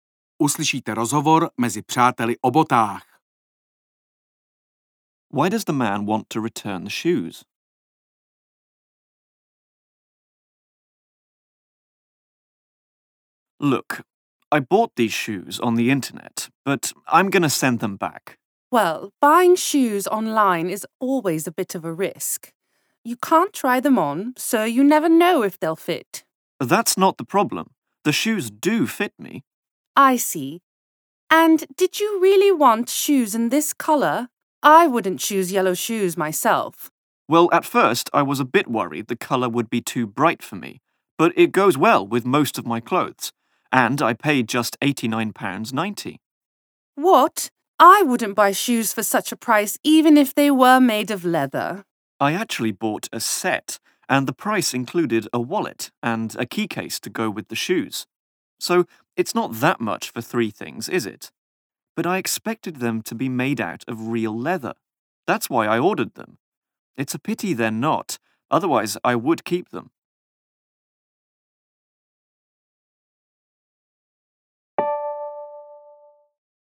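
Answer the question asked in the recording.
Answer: Because they are not made of real leather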